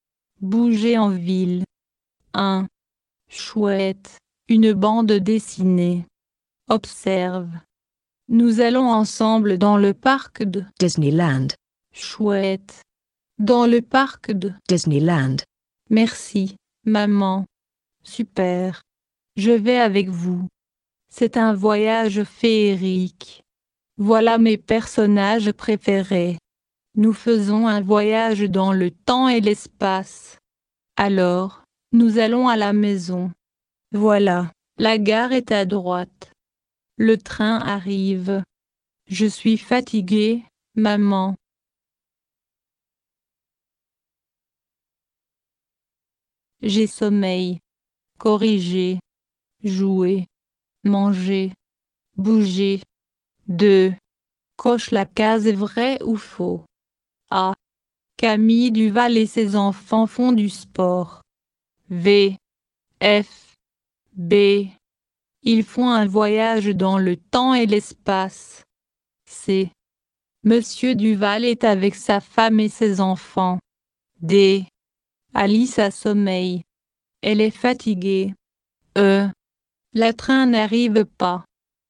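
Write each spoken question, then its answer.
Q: Camille Duval et ses enfants font du sport.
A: Faux

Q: Ils font un voyage dans le temps et l'espace.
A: Vrai

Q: Le train n'arrive pas.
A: Faux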